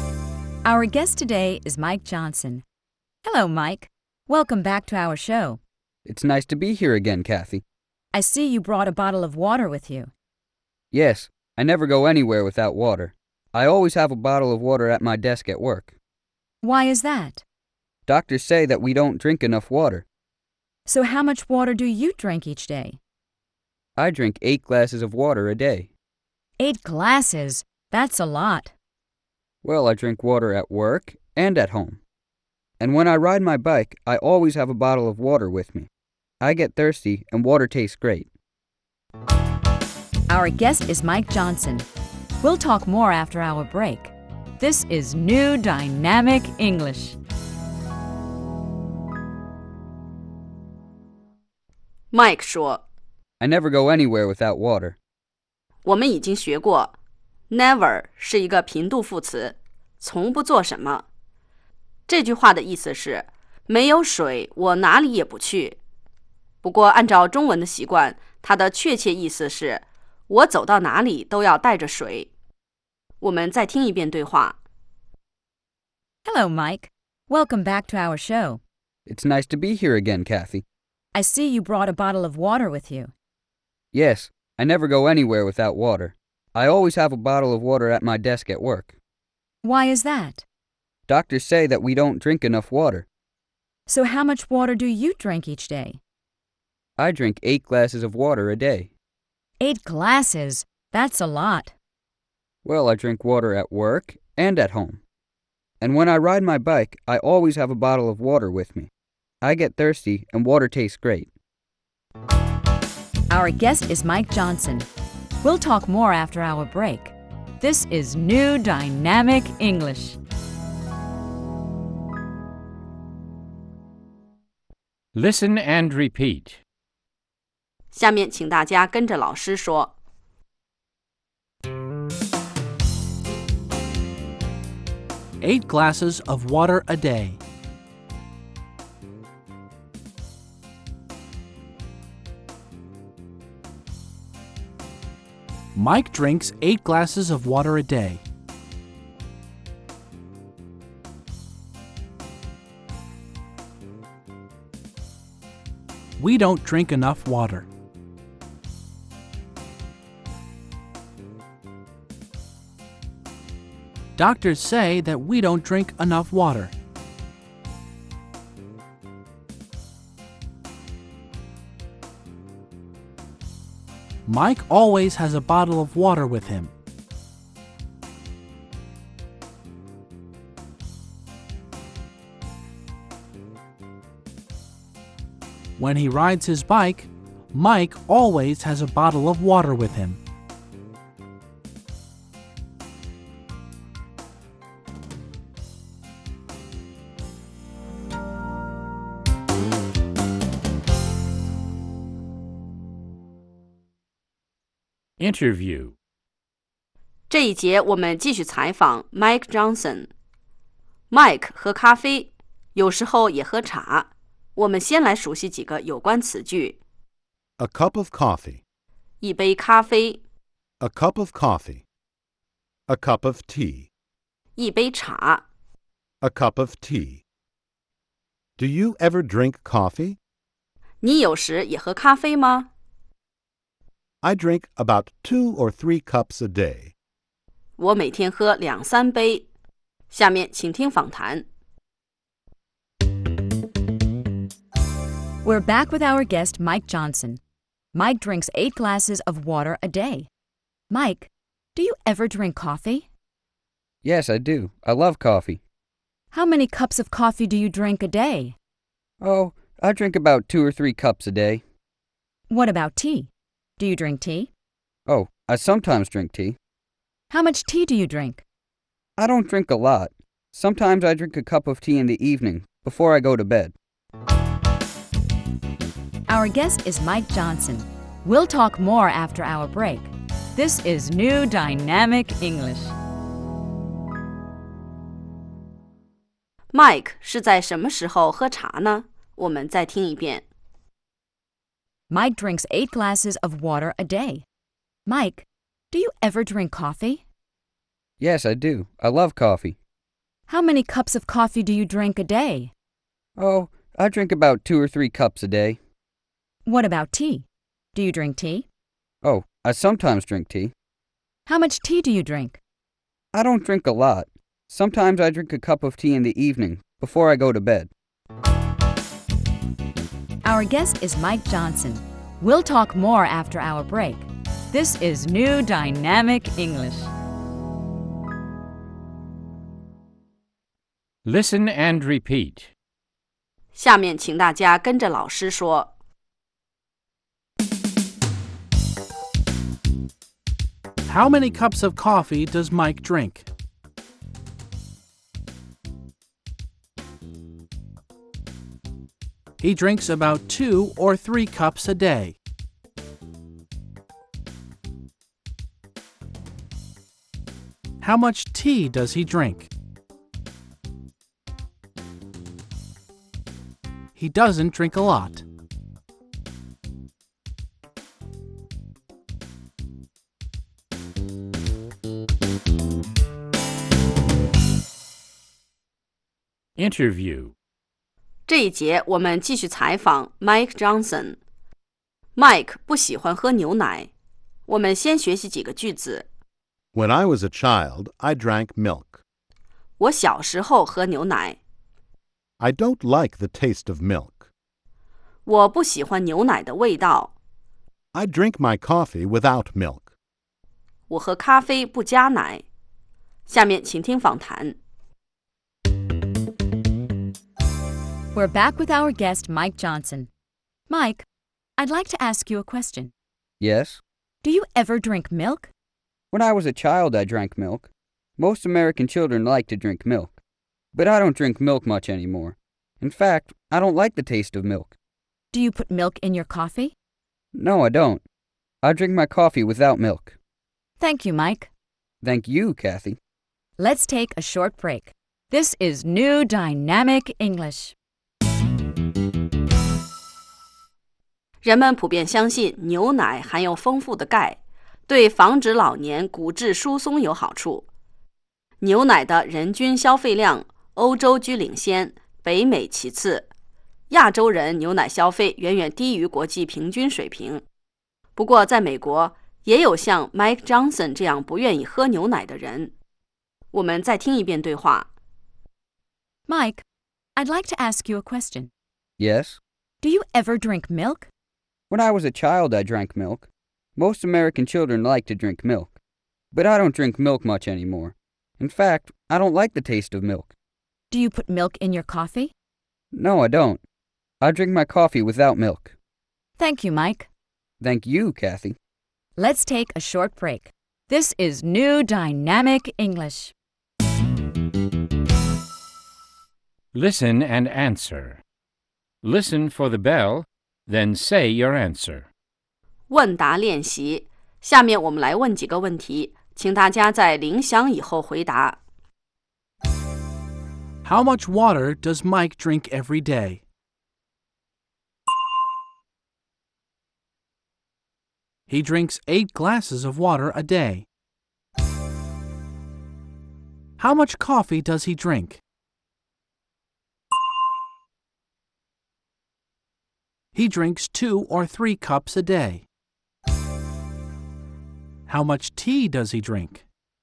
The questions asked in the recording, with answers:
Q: How much water does Mike drink every day?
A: He drinks 8 glasses of water a day.

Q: How much tea does he drink?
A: He doesn't drink a lot.